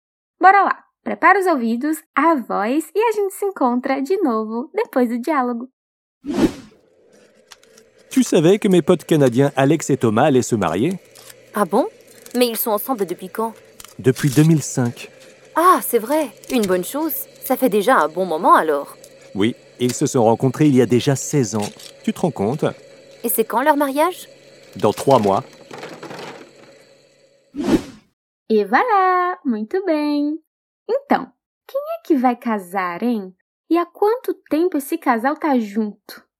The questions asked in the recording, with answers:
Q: Então, quem é que vai casar, hein?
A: Os amigos dela, canadenses, canadian, vão se casar.

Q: E há quanto tempo esse casal tá junto?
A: Depuis 2005. Desde 2005.